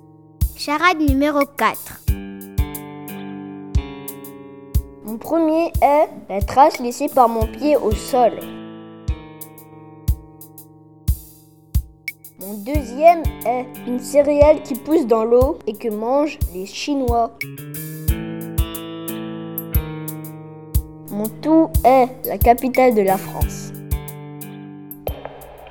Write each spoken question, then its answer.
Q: Mon tout est la capitale de la France.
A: La bonne réponse est Paris.